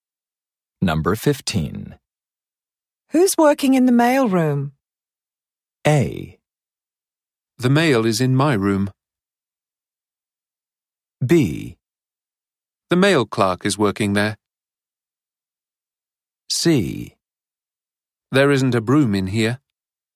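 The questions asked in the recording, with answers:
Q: Who's working in the mail room?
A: B: The mail clerk is working there.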